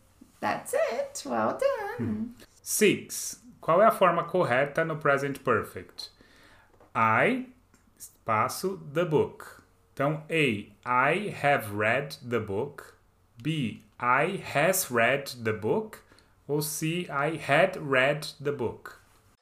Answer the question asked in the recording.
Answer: Letter A. I have read the book.